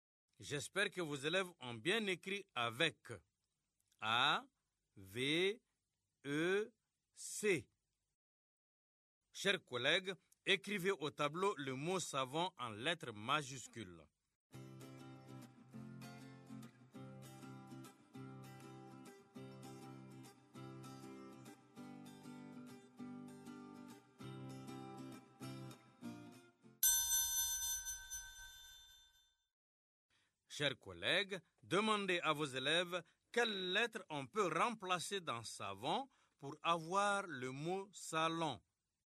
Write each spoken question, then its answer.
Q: Chers collègues, demandez à vos élèves quelles lettres on peut remplacer dans savon pour avoir le mot salon.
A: Dans savon, on remplace la lettre V par la lettre L pour avoir salon.